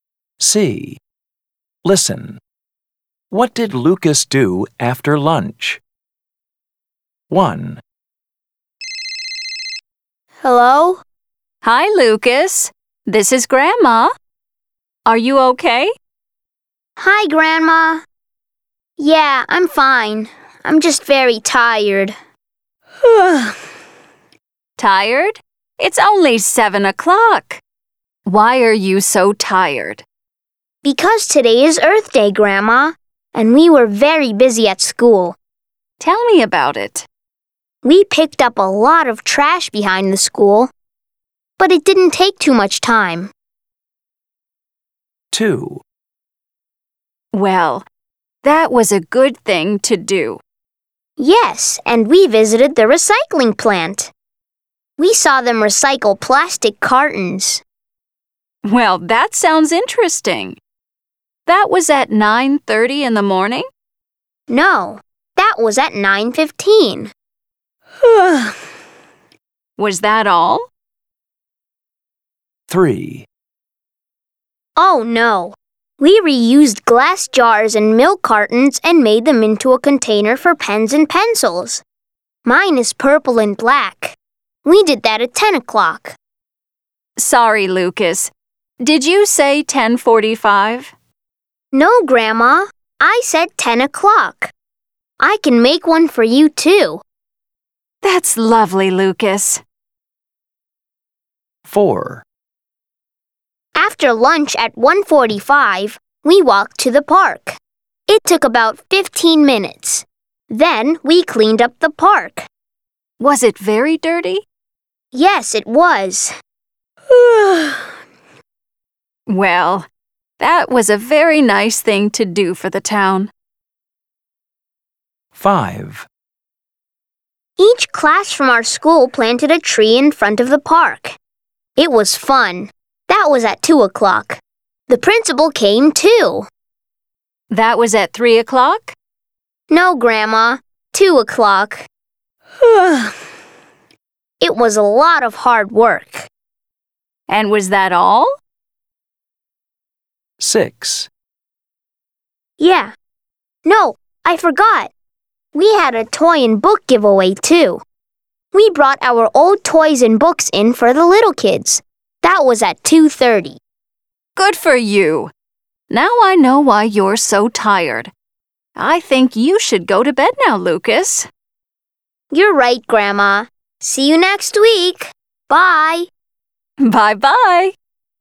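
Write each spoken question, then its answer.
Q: What did Lucas do after lunch?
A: He walked to the park and cleaned it up.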